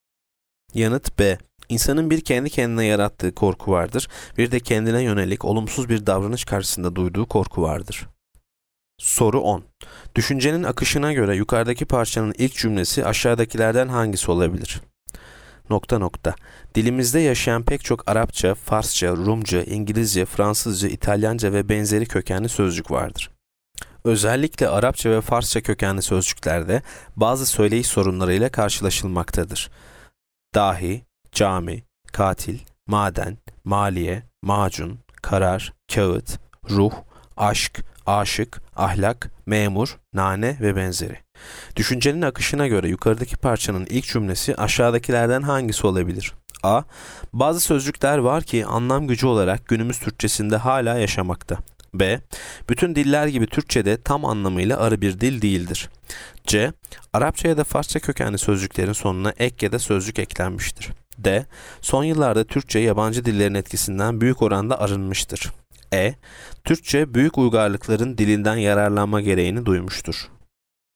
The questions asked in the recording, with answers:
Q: Düşüncenin akışına göre yukarıdaki parçanın ilk cümlesi aşağıdakilerden hangisi olabilir?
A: Yanıt B. Bütün diller gibi Türkçe'de tam anlamıyla arı bir dil değildir.